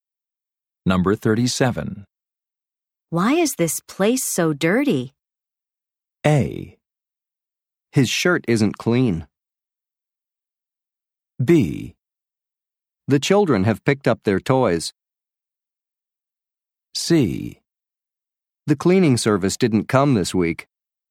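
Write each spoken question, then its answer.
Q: Why is this place so dirty?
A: C: The cleaning service didn't come this week.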